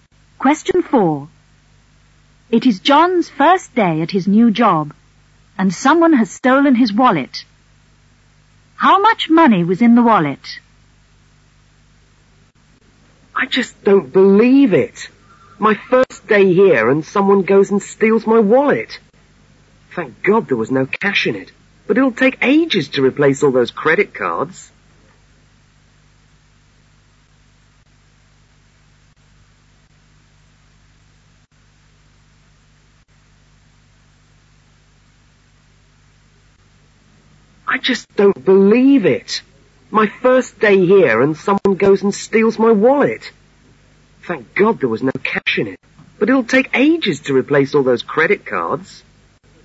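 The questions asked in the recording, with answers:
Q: How much money was in the wallet?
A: None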